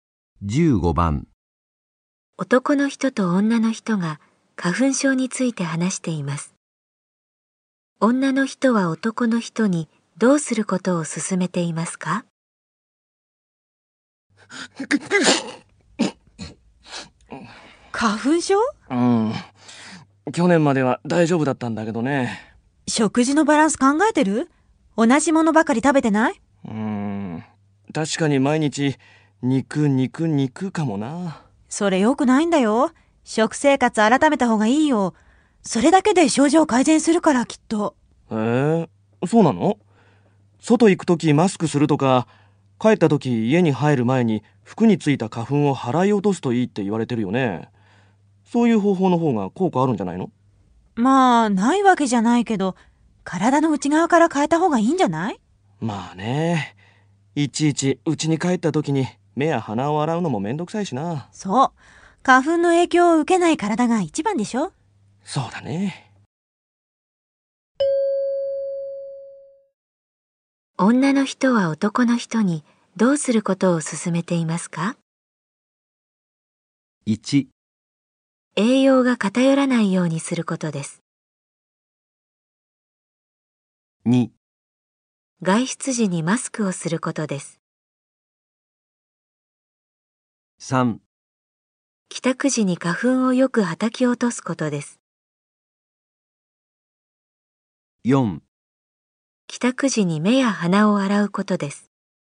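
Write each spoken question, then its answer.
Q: 人にどうすることを勧めていますか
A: 1: 栄養が偏らないようにすることです。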